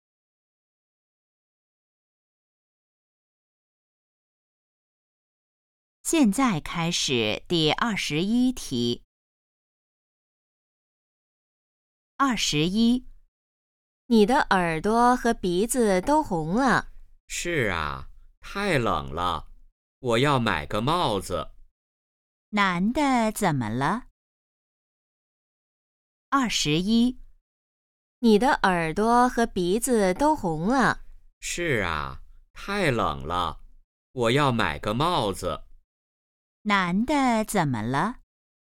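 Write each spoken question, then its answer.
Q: 男的怎么了?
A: 他很冷,耳朵和鼻子都红了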